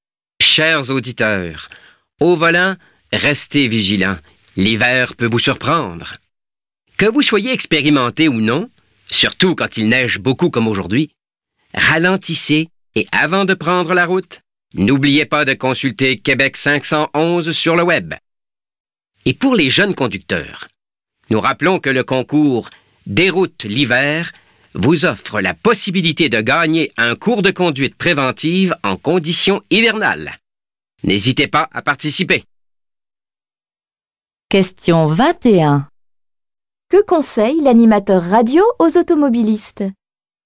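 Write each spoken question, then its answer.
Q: Que conseille l'animateur radio aux automobilistes?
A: De ralentir et de consulter Québec 511 avant de prendre la route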